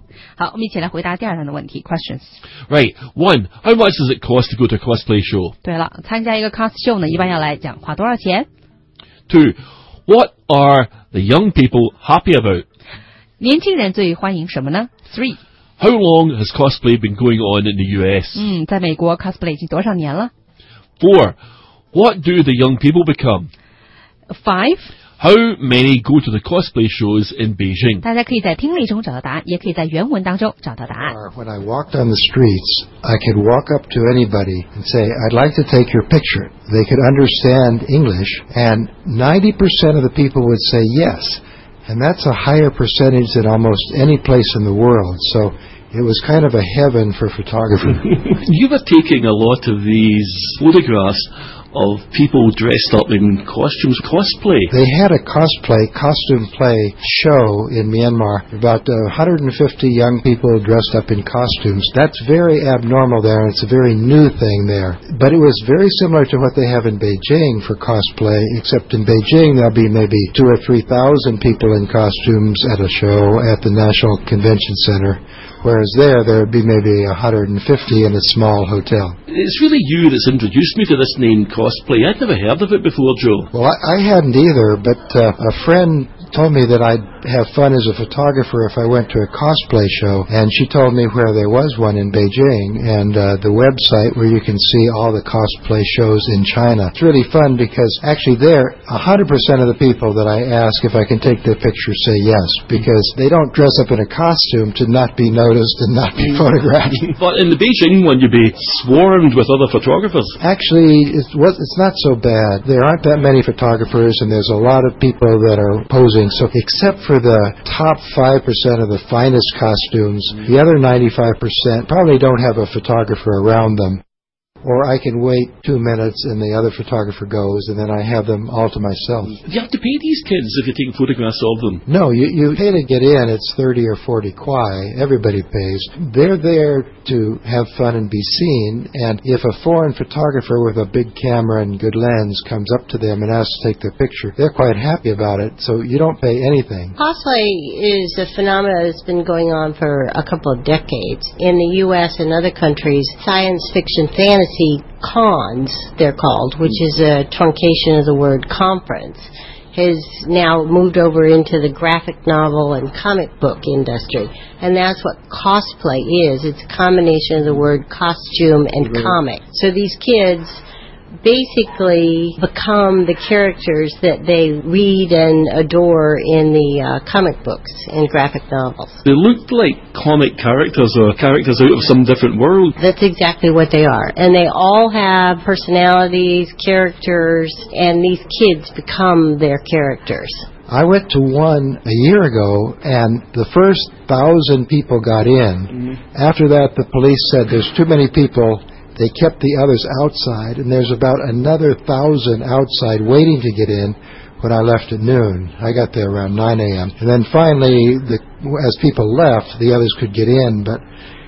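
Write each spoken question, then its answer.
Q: how much does it cost to go to a cosplay show?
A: 30 or 40 kuai

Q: what are the young people happy about?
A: Having a foreign photographer ask to take their picture

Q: how long has cosplay been going on in the US?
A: A couple of decades

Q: what do the young people become?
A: The characters from the comic books and graphic novels they read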